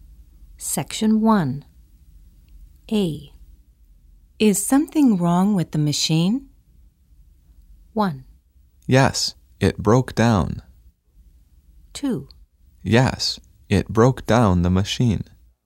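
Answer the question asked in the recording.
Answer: 1: Yes, it broke down.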